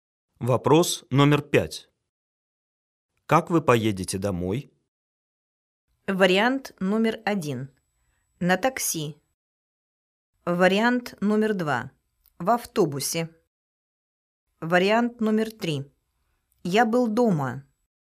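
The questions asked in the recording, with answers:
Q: Как вы поедете домой?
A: 1: На такси.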